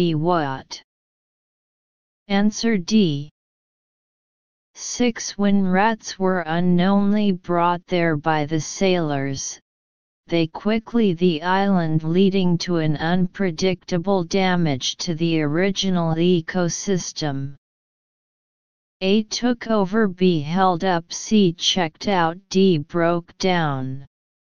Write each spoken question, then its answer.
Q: When rats were unknowingly brought there by the sailors, they quickly the island, leading to an unpredictable damage to the original ecosystem.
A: Answer A.